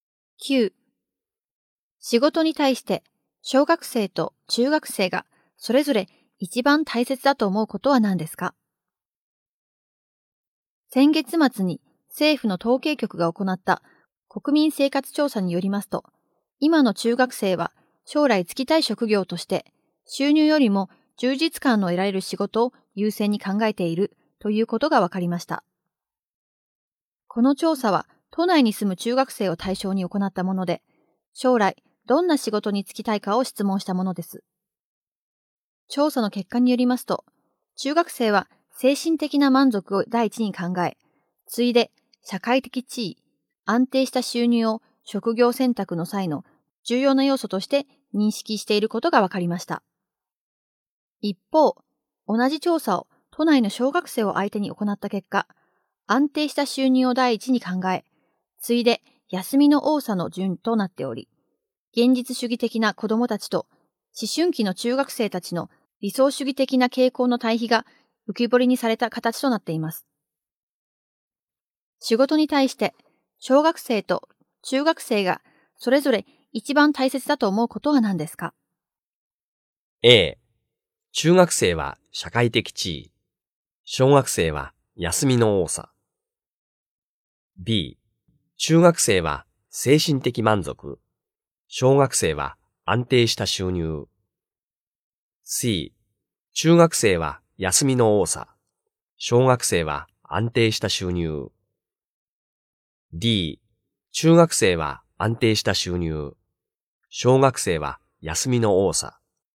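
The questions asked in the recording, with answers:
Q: 仕事に対して小学生と中学生がそれぞれ一番大切だと思うことは何ですか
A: B: 中学生は精神的満足、小学生は安定した収入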